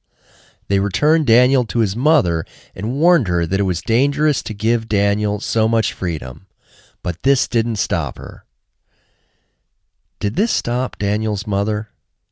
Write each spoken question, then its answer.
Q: Did this stop Daniel's mother?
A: No, this didn't stop Daniel's mother.